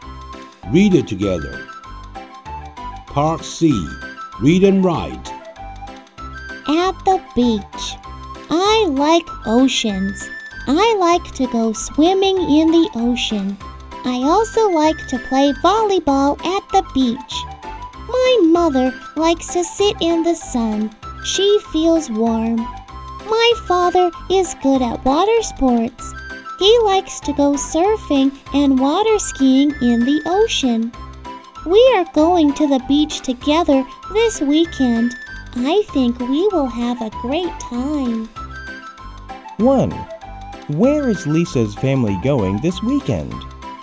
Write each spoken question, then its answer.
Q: Where is Lisa's family going this weekend?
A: They are going to the beach this weekend.